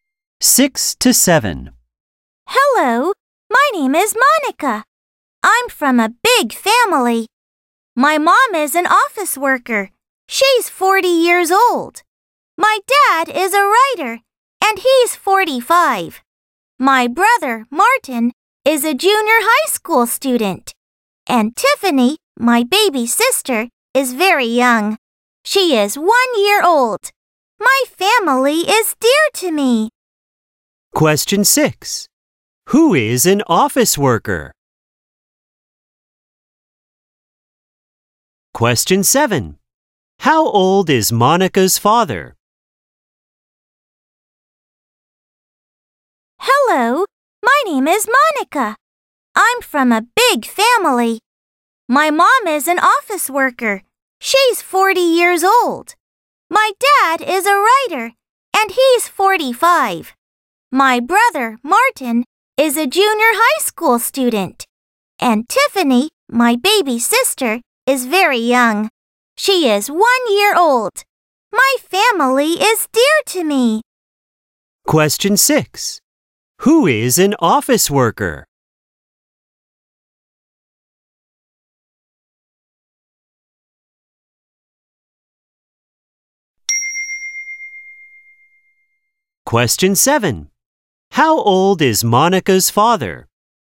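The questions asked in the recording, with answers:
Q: Who is an office worker?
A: Monica's mom

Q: How old is Monica's father?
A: 45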